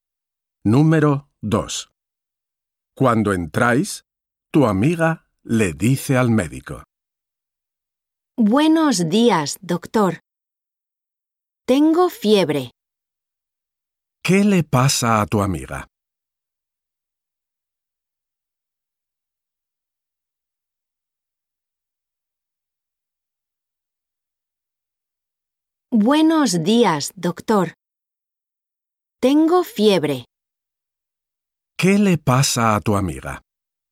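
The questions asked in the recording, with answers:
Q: ¿Qué le pasa a tu amiga?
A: tiene fiebre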